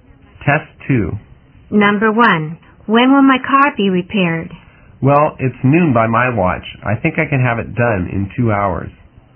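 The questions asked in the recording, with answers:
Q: When can the woman get her car?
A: At 2 o'clock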